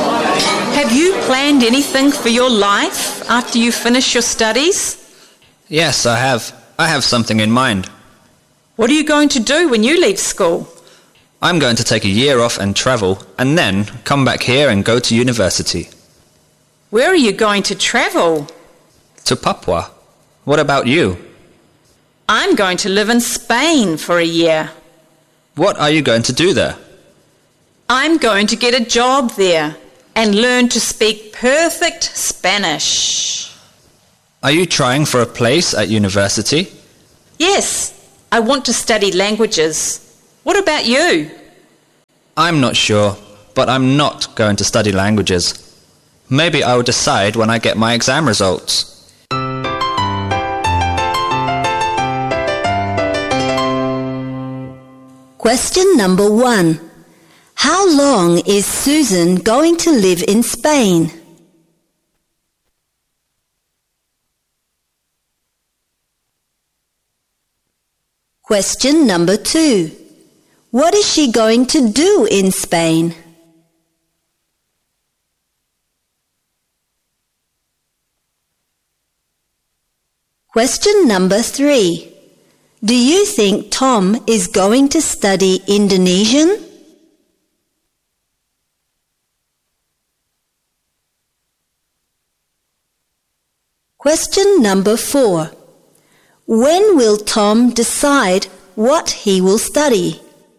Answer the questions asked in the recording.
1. A year.
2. She will get a job and learn to speak perfect Spanish.
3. No, he is not.
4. When he gets his exam results.